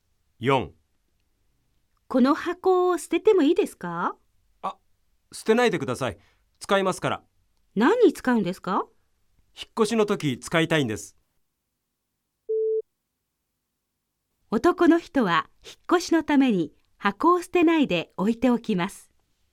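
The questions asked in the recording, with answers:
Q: 男の人は引っ越しのために箱を捨てないで置いておきます。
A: ○(正しい)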